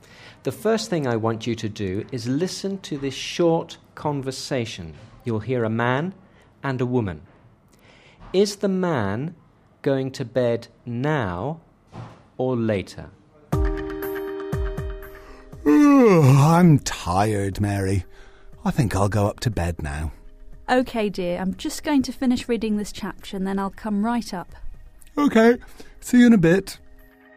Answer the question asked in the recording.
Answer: He's going to bed now.